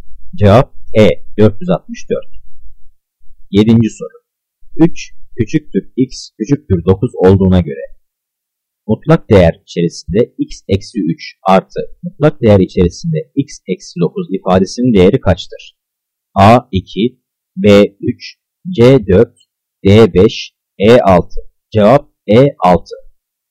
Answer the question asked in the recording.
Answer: Cevap E 6.